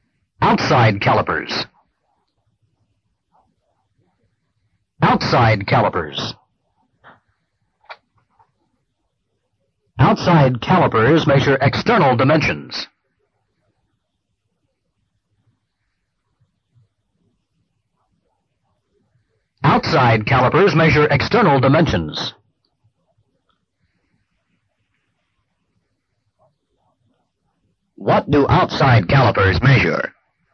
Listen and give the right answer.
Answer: External dimensions.